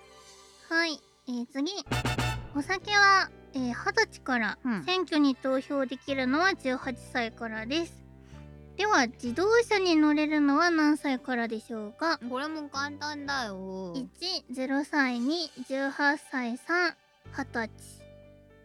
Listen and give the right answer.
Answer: はい、1の0歳です。